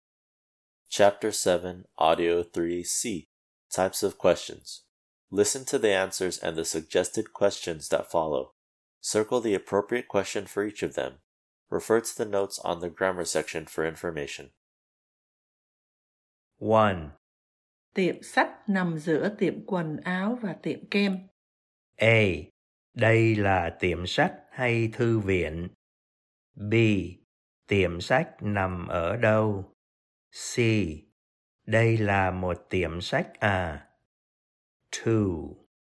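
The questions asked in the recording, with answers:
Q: Circle the appropriate question for each of them.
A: B: Tiệm sách nằm ở đâu?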